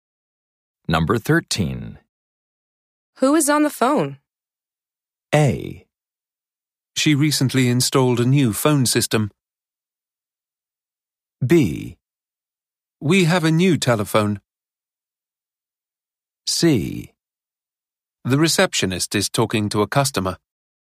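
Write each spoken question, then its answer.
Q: Who is on the phone?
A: C: The receptionist is talking to a customer.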